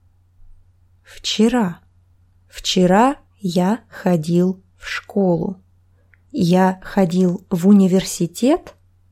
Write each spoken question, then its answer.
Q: Я ходил в университет?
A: Нет, я ходил в школу.